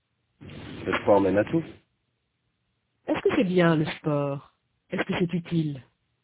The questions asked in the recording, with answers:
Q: Est-ce que c'est bien le sport?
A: Oui. Le sport mène à tout.

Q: Est-ce que c'est utile?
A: Oui. Le sport mène à tout.